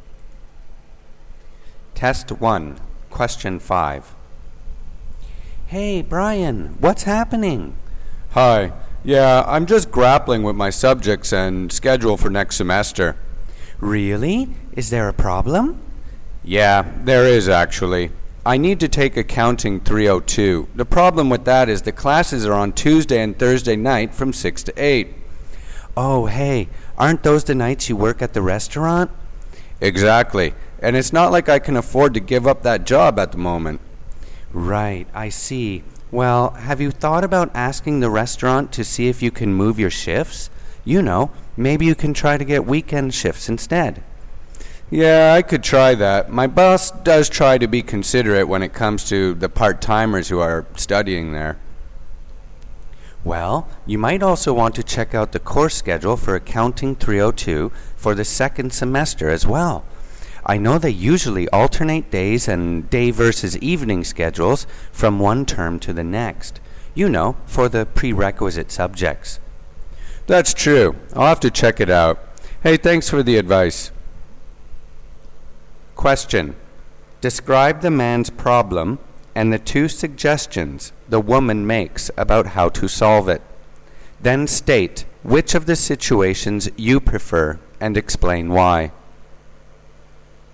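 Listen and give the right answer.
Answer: Problem: Accounting 302 classes are on Tuesday and Thursday nights, when he works at the restaurant, and he can't give up the job. Suggestions: ask the restaurant to move his shifts to weekends, or check whether the course runs at different times next semester. Which one to prefer is the speaker's own choice.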